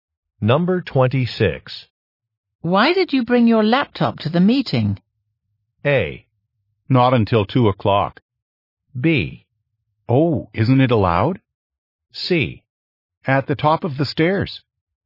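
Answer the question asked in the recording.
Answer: B: Oh, isn't it allowed?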